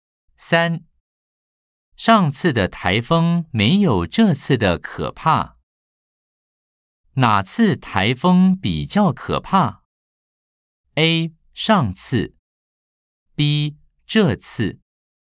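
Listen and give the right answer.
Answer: B: 这次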